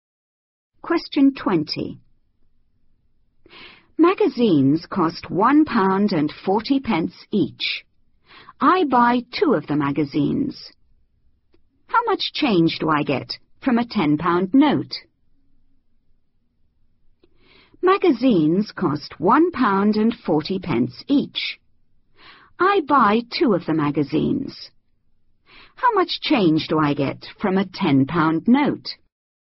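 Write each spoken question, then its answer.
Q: How much change do I get from a £10 note?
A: £7.20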